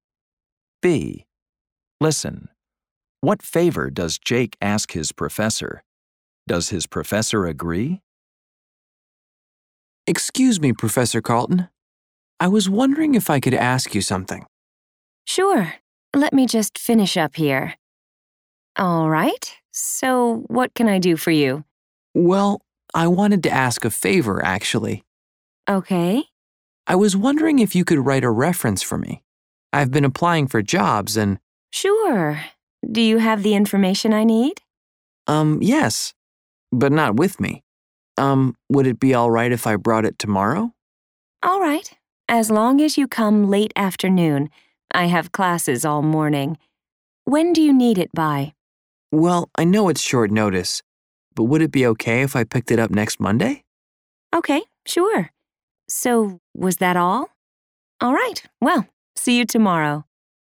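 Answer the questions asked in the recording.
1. To write a reference for him
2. Yes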